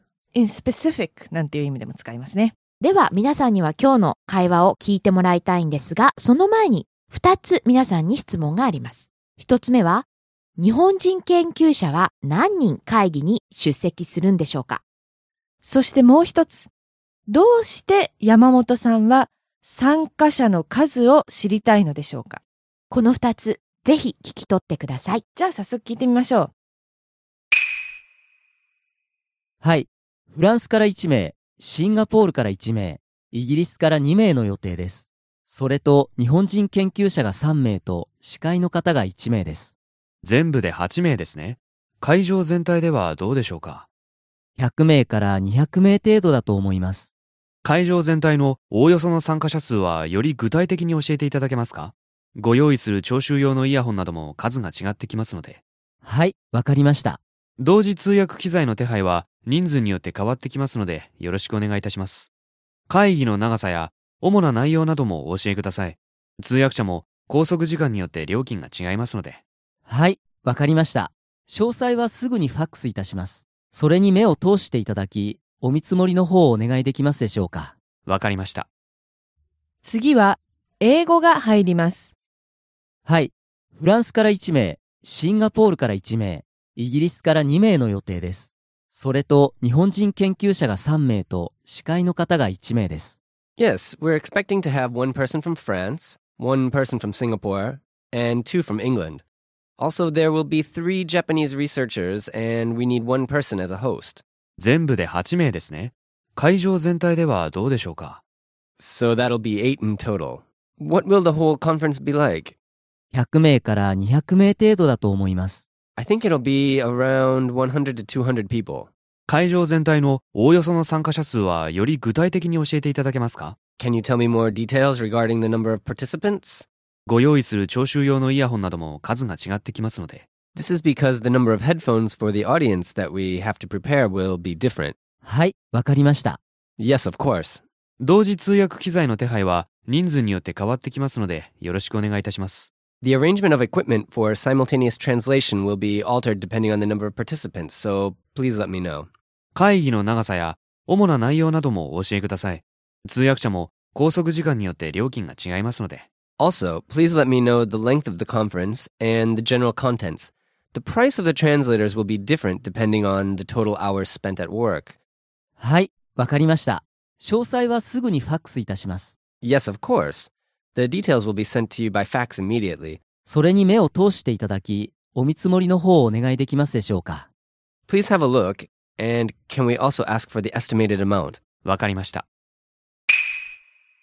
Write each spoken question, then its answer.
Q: 日本人研究者は何人会議に出席するんでしょうか。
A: 3人ですよね。

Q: どうして山本さんは参加者の数を知りたいのでしょうか。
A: 人数によってイヤホンとか機材の数が変わるからですよね。